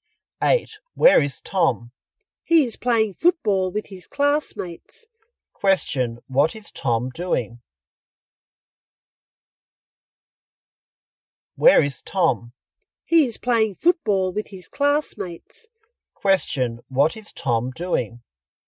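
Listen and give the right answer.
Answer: Playing football with his classmates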